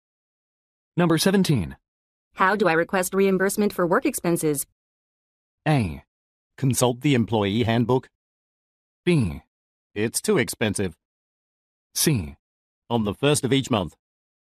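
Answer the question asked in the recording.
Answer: A: Consult the employee handbook.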